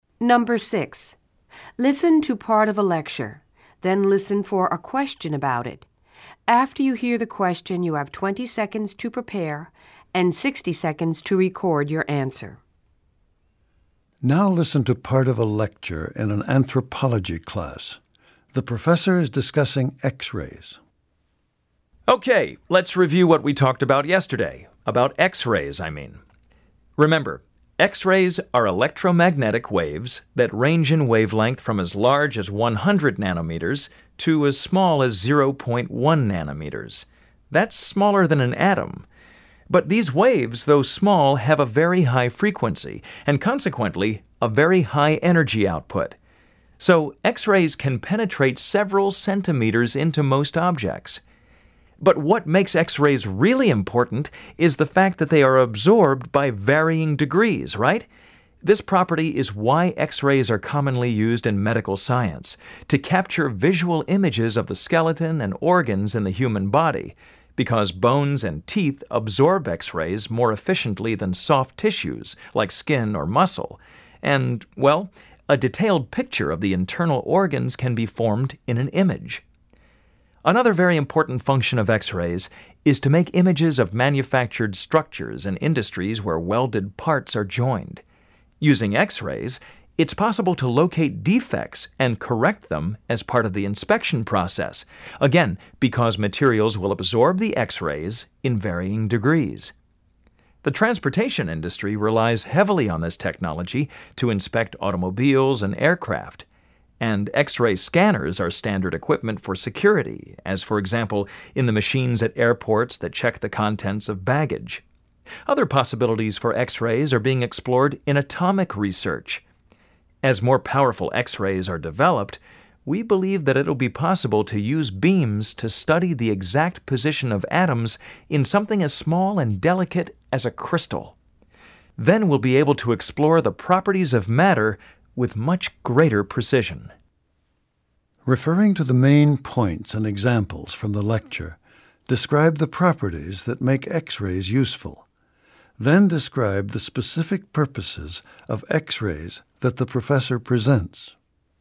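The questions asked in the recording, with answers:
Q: Referring to the main points and examples from the lecture, describe the properties that make X-rays useful. Then describe the specific purposes of X-rays that the professor presents.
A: X-rays have high frequency and energy, so they penetrate objects, and materials absorb them to different degrees. Uses: medical images of bones and organs, inspecting welded parts in industry such as cars and aircraft, airport baggage security scanners, and future atomic research on crystals.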